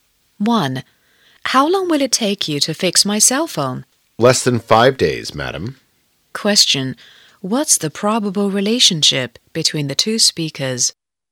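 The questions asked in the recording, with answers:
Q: What's the probable relationship between the two speakers?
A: Customer and phone repairman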